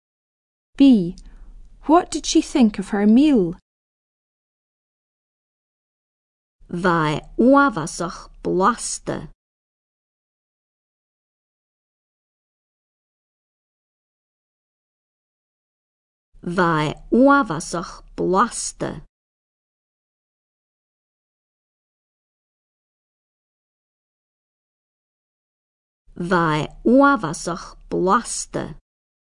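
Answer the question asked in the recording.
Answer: It was very tasty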